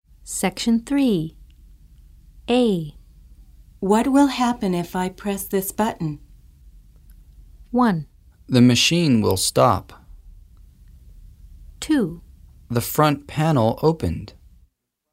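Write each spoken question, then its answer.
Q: What will happen if I press this button?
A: 1: The machine will stop.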